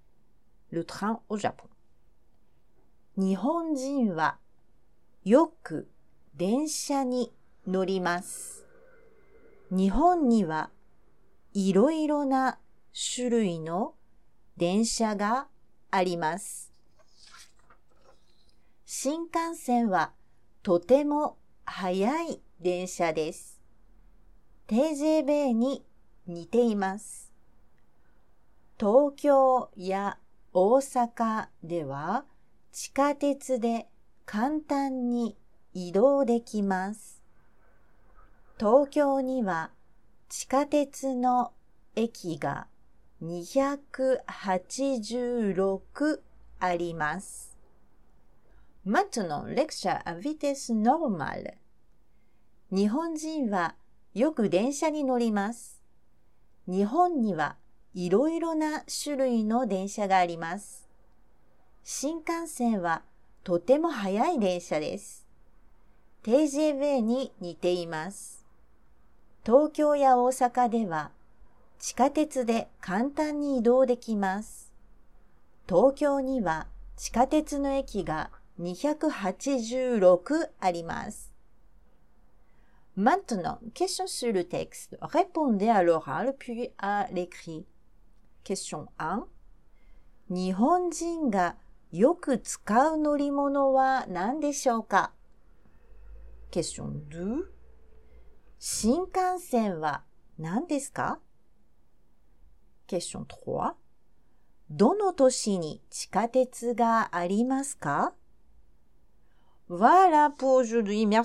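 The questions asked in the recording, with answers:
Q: 日本人がよく使う乗り物は何でしょうか?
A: 電車

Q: 新幹線は何ですか?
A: とても速い電車です

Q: どの都市に地下鉄がありますか?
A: 東京や大阪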